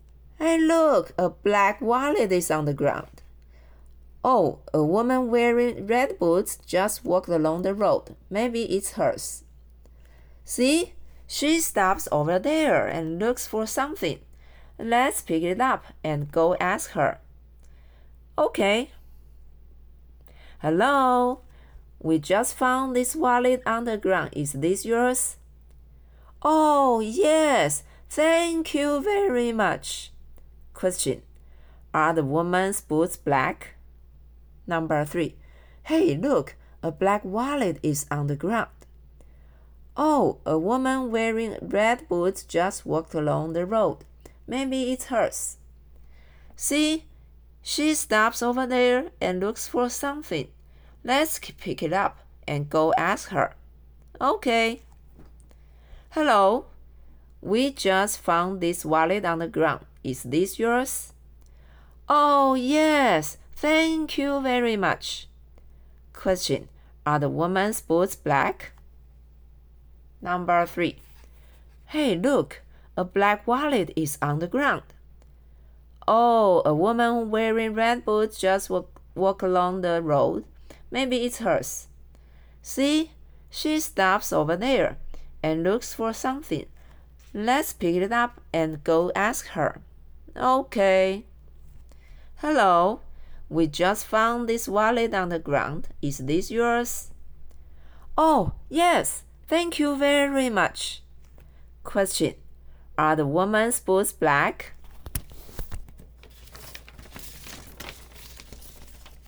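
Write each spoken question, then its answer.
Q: Are the woman's boots black?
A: No, they are red.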